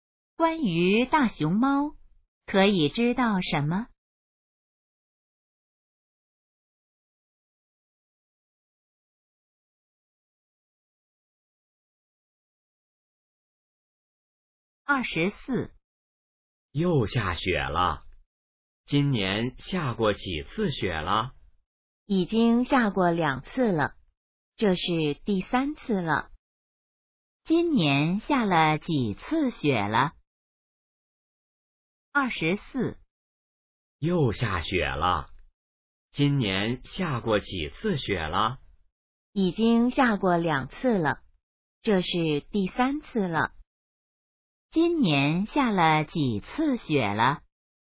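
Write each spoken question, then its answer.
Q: 今年下了几次雪了?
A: 三次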